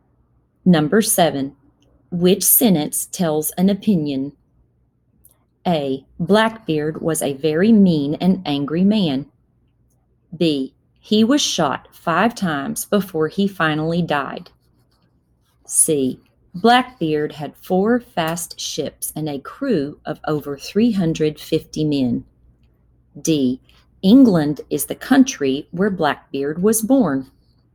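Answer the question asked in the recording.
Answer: A: Blackbeard was a very mean and angry man.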